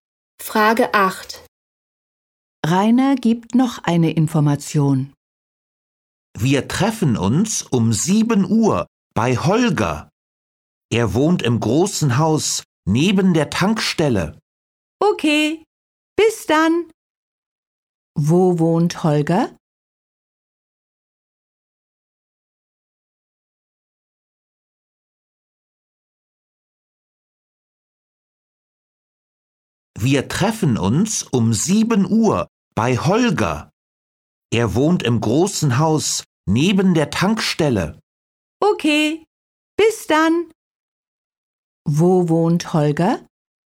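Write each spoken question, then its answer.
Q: Wo wohnt Holger?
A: Im großen Haus neben der Tankstelle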